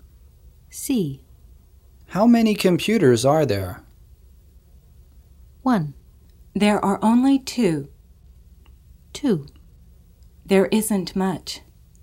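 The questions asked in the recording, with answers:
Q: How many computers are there?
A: 1: There are only 2.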